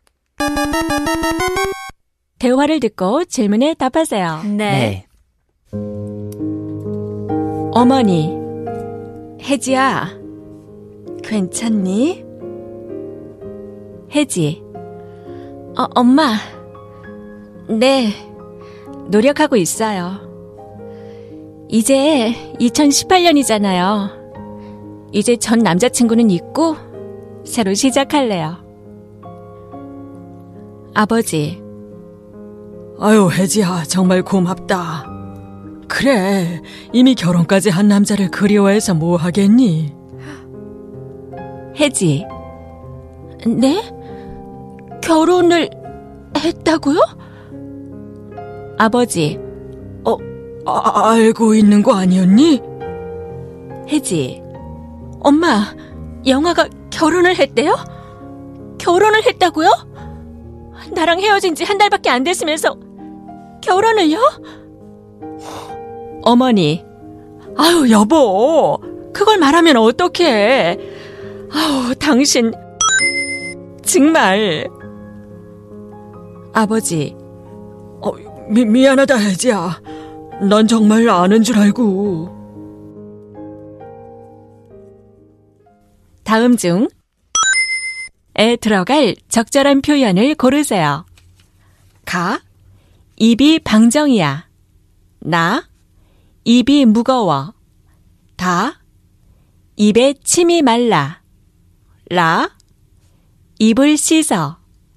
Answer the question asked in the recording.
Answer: that leaves us with the correct answer with the phrase 당신 입이 방정이야 정말.